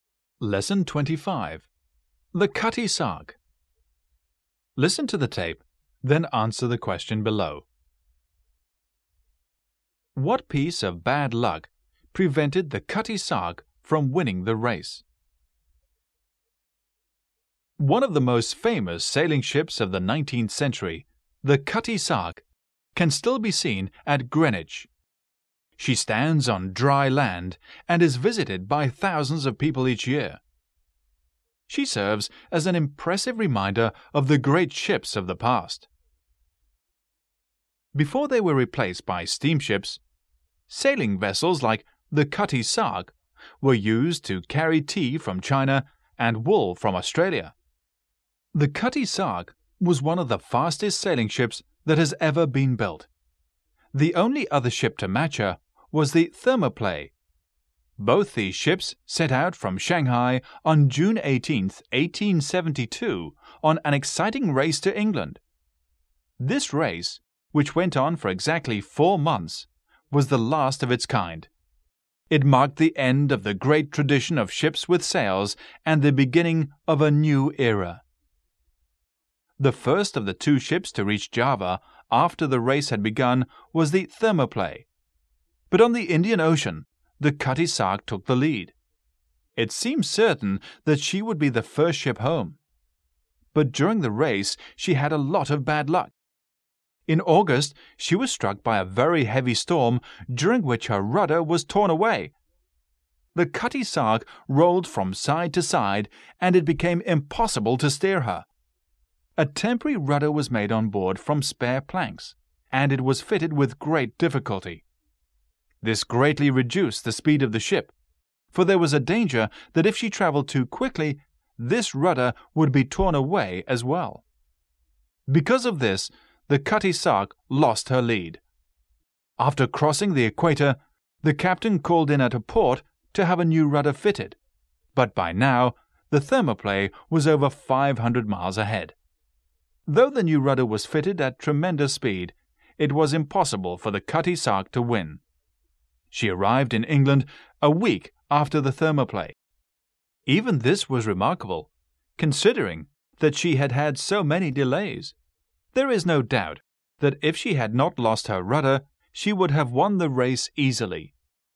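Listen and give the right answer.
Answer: She lost her rudder in a heavy storm.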